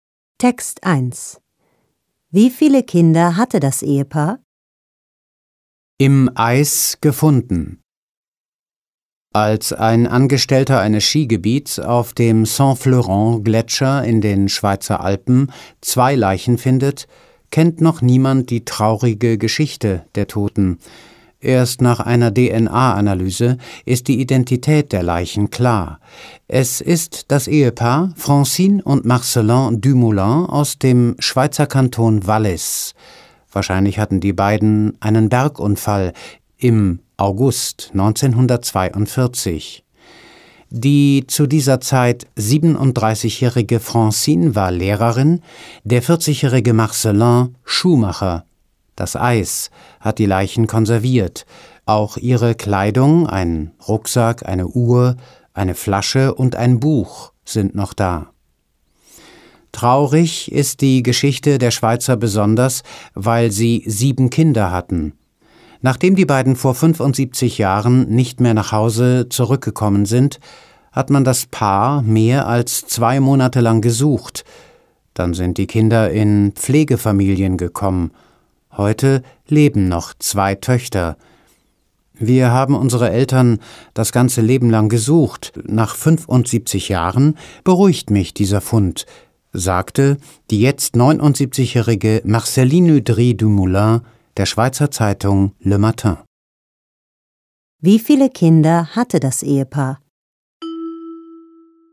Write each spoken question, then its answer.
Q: Wie viele Kinder hatte das Ehepaar?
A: Es hatte sieben Kinder.